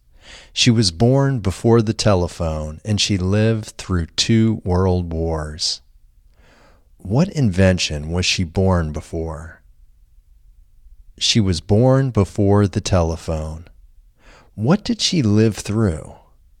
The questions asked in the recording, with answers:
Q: What invention was she born before?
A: She was born before the telephone.

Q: What did she live through?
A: She lived through two world wars.